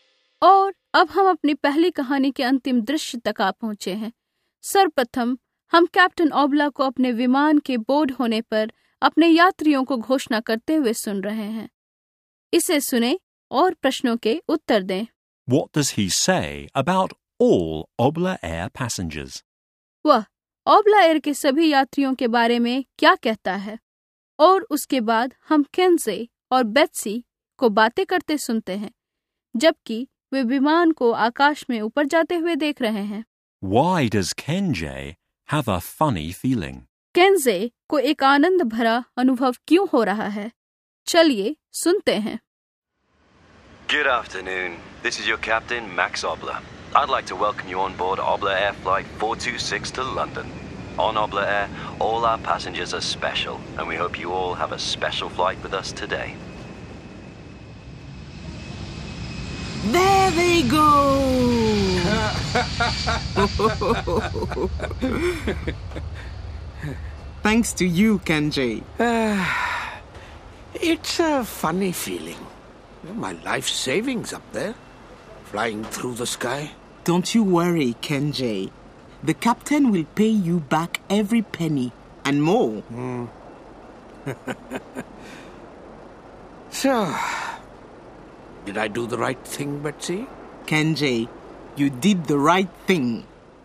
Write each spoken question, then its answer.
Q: What does he say about all Obla Air passengers?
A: On Obla Air, all our passengers are special, and we hope you have a special flight with us today.

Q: Why does Kenjay have a funny feeling?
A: My life savings up there, flying through the sky.